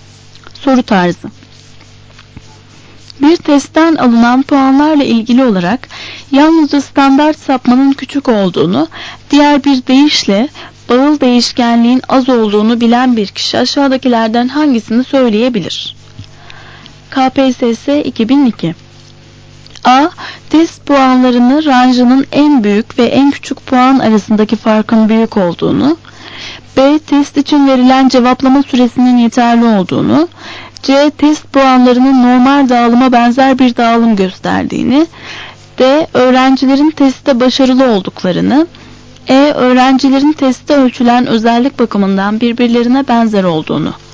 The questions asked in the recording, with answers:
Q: Bir testten alınan puanlarla ilgili olarak yalnızca standart sapmanın küçük olduğunu, diğer bir deyişle bağıl değişkenliğin az olduğunu bilen bir kişi aşağıdakilerden hangisini söyleyebilir?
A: Doğru cevap E.